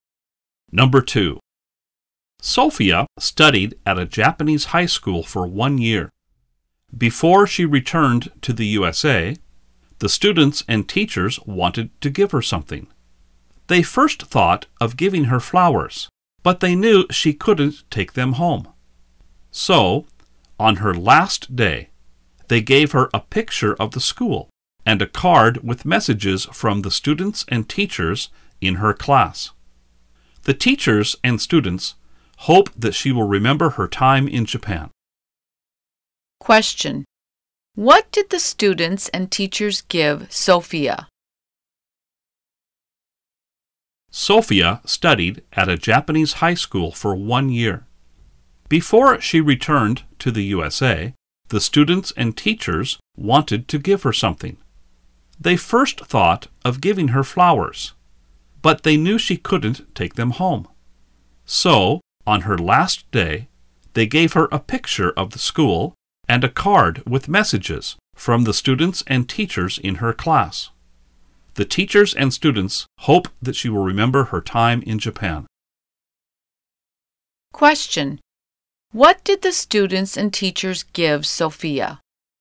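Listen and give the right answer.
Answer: A picture of the school and a card with messages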